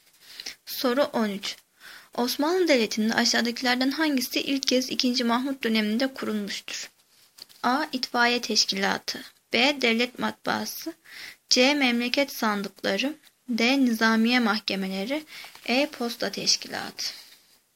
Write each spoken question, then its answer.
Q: Mahmut döneminde kurulmuştur?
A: Cevap E. Posta Teşkilatı.